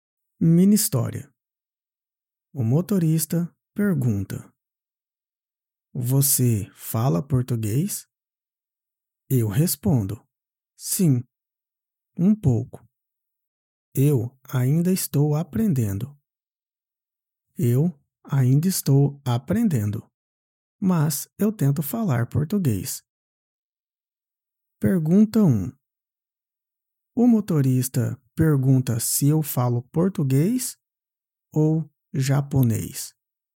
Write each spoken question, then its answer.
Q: O motorista pergunta se eu falo português ou japonês.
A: Português. Ele pergunta se eu falo português.